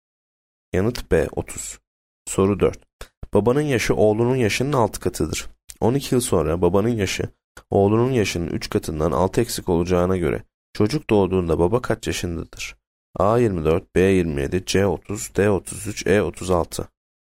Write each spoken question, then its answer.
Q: 12 yıl sonra babanın yaşı oğlunun yaşının 3 katından 6 eksik olacağına göre çocuk doğduğunda baba kaç yaşındadır?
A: Yanıt C 30.